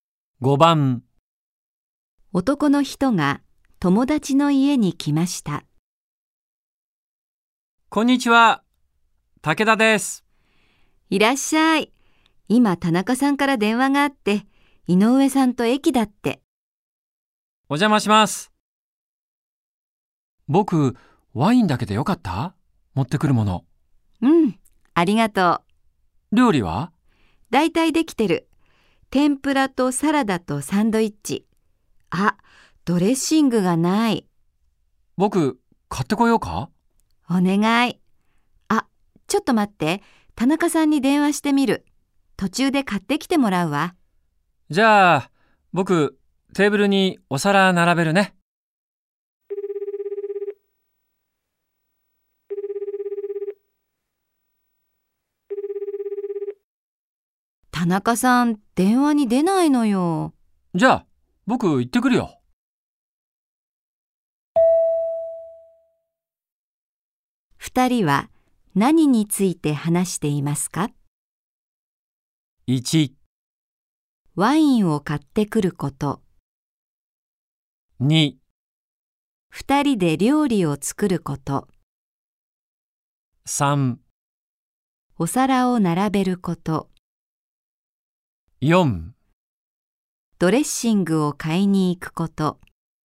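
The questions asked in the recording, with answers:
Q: 二人は何について話していますか?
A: 4: ドレッシングを買いに行くこと。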